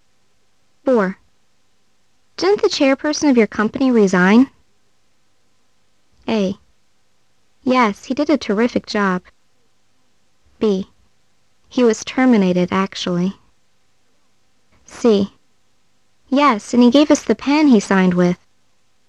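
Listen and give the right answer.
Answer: B: He was terminated, actually.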